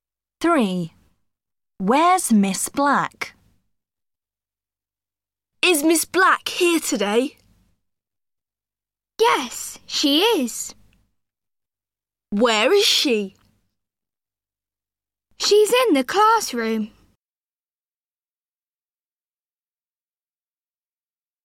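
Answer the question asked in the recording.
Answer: In the classroom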